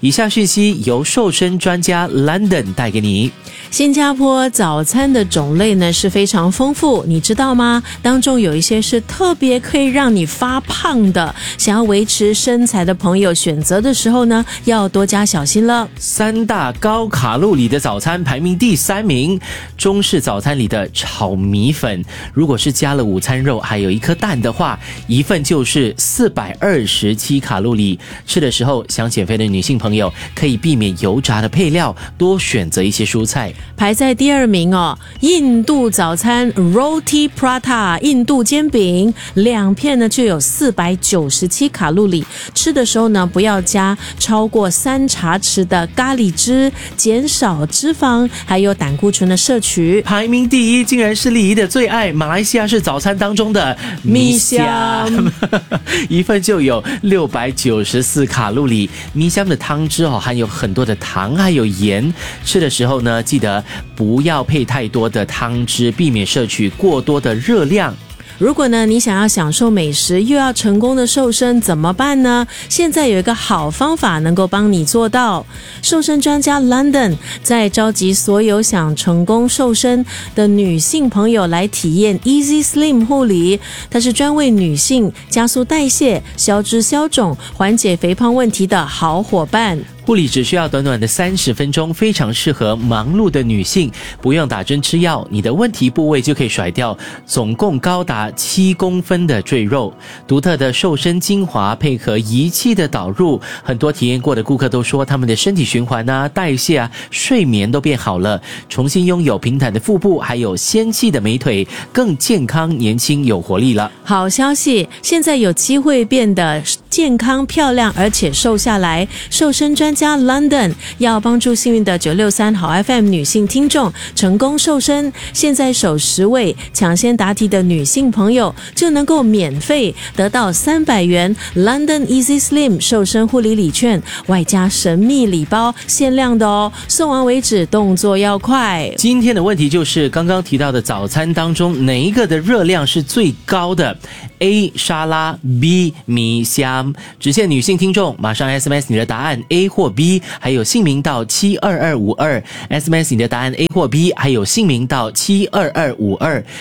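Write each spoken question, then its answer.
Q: 今天的问题就是刚刚提到的早餐当中哪一个的热量是最高的?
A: B: 米香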